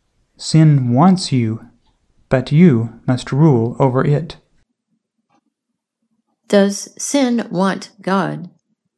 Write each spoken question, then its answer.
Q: Does sin want God?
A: No, sin wants Cain.